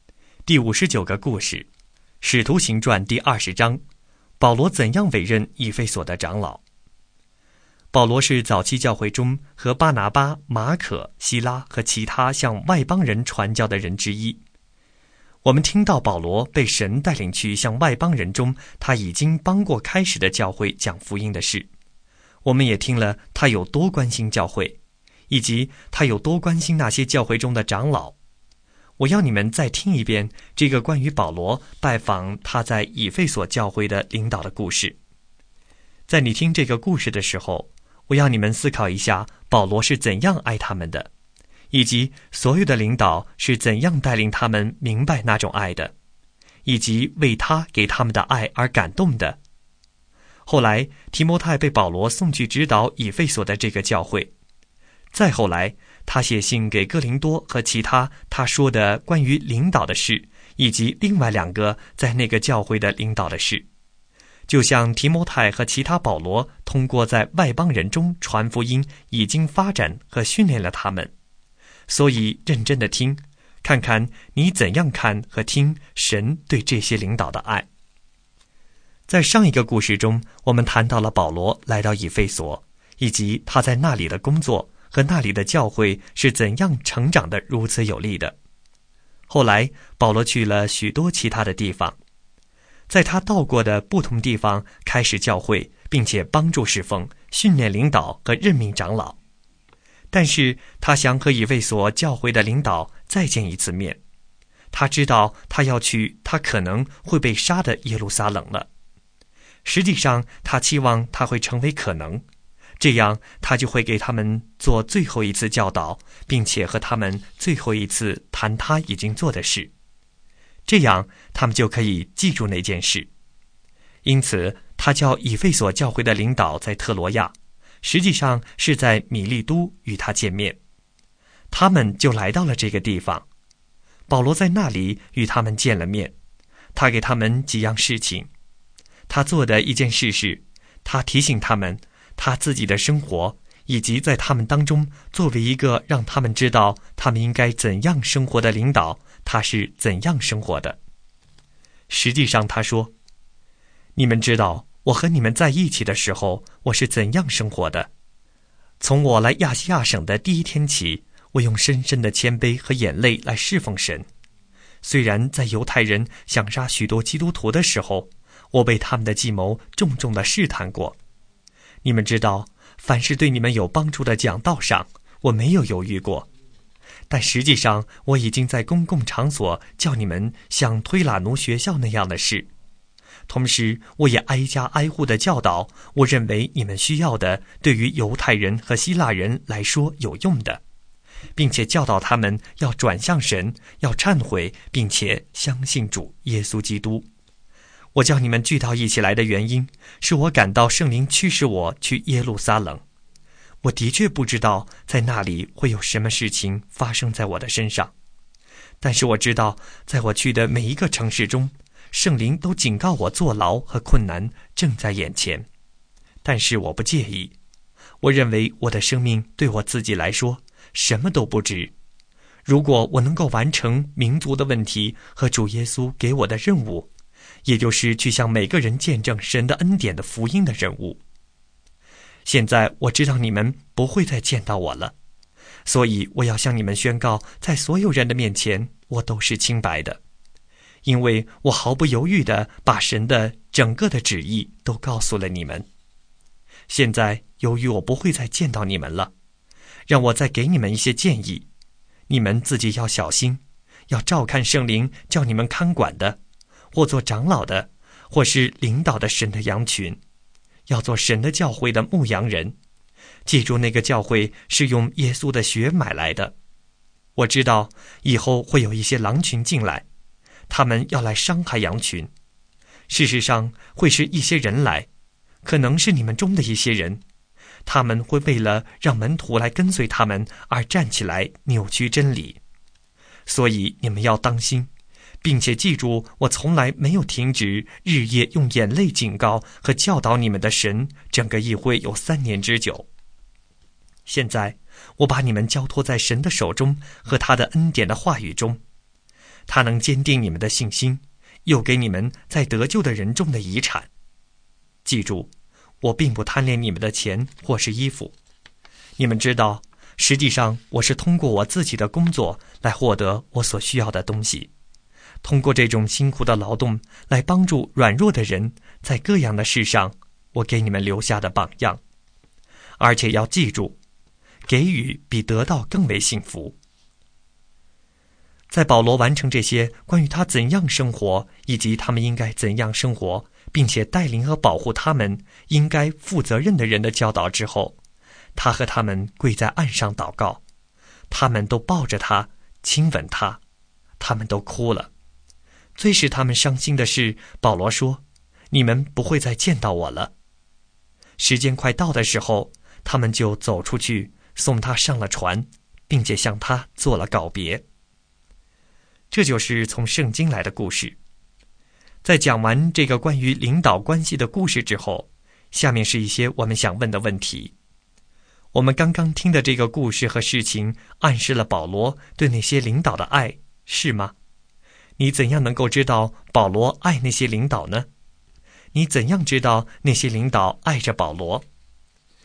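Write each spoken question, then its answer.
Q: 你怎样知道那些领导爱着保罗?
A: 他们和保罗跪下祷告,都抱着他、亲吻他、哭了,还送他上船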